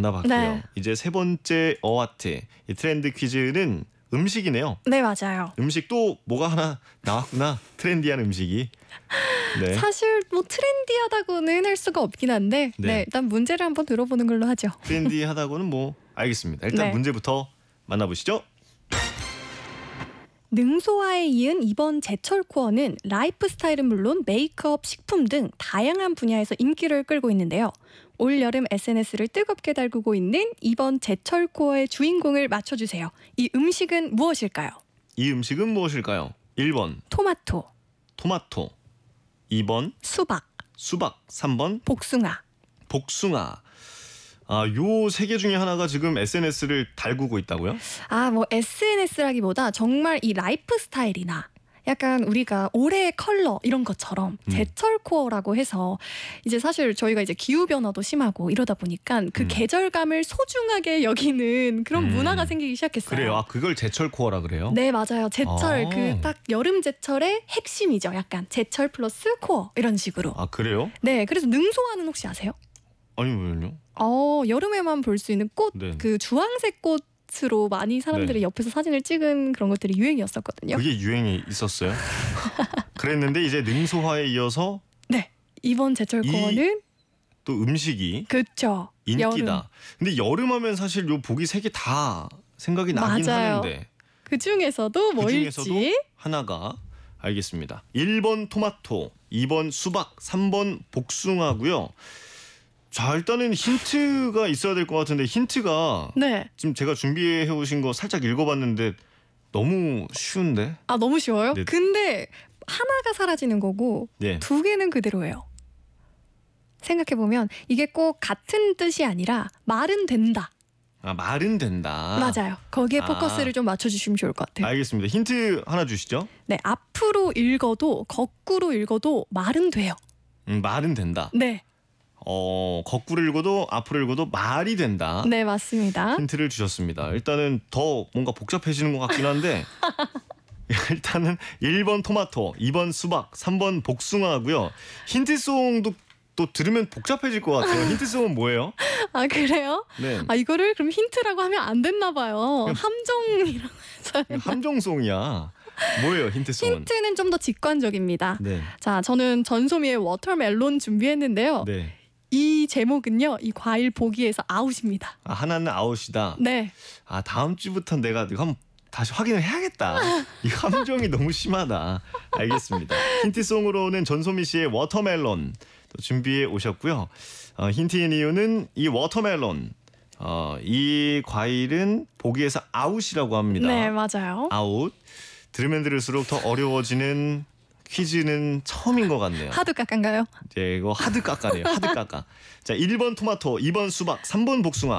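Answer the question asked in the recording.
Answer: 1: 토마토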